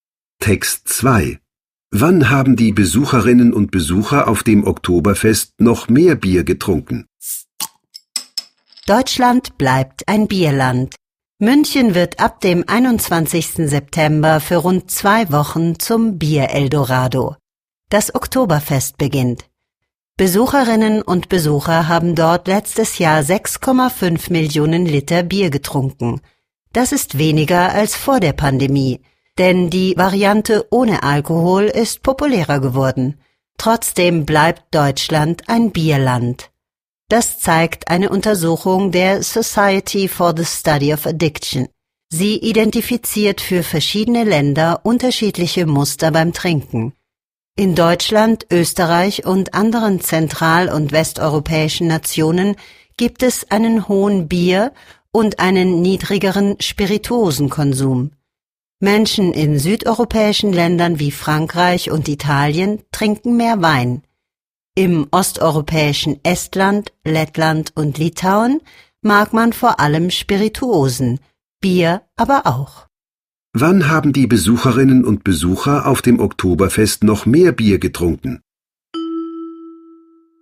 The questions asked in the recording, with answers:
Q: Wann haben die Besucherinnen und Besucher auf dem Oktoberfest noch mehr Bier getrunken?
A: Mehr war das noch in den Jahren vor der Pandemie.